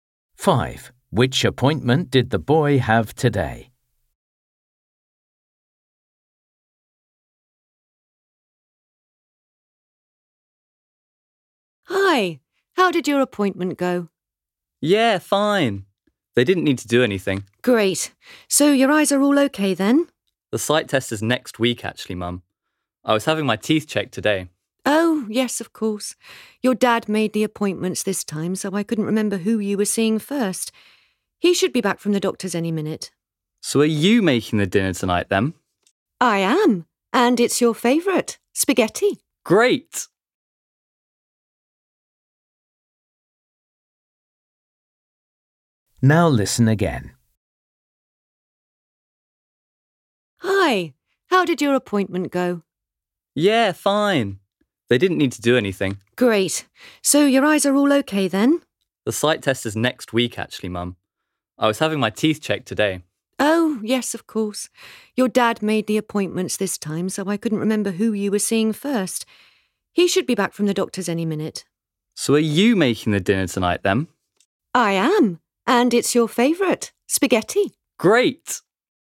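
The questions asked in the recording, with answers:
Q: Which appointment did the boy have today?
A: the dentist (teeth check)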